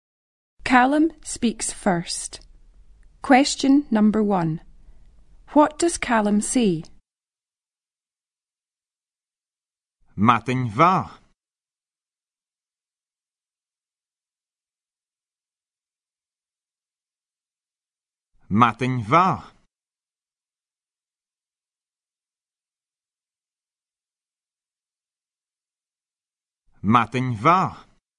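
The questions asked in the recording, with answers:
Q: What does Callum say?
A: Good morning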